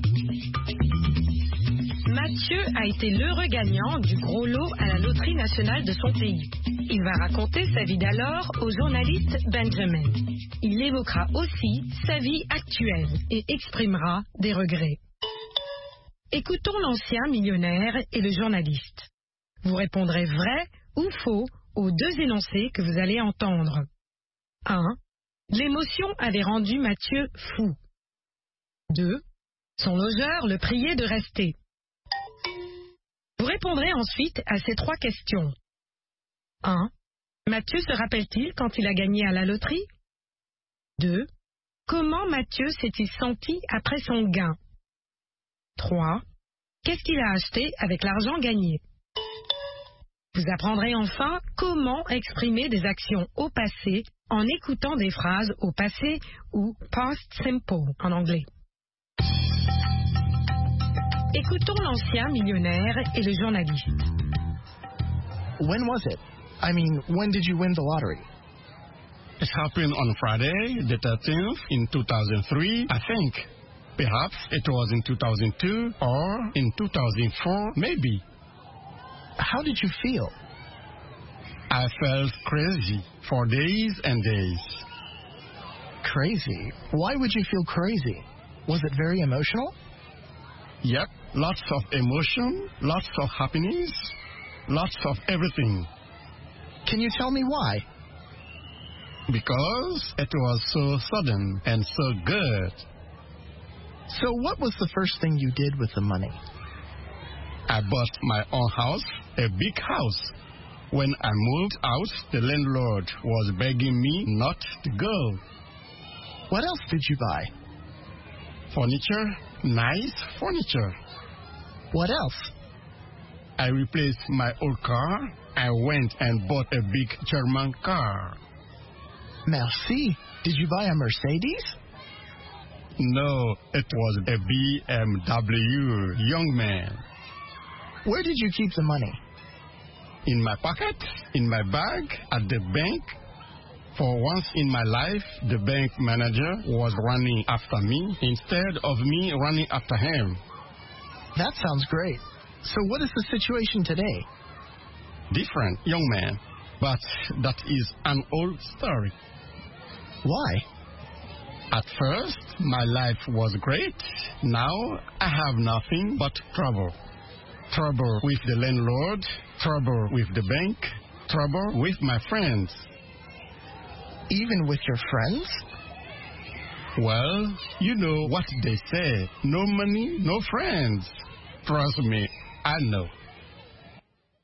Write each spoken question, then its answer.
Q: Mathieu se rappelle-t-il quand il a gagné à la loterie?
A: Non.

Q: Son logeur le priait de rester.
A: L'énoncé 2 est vrai. Son logeur l'a prié de rester.

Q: Qu'est-ce qu'il a acheté avec l'argent gagné?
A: Une maison, des meubles et une voiture.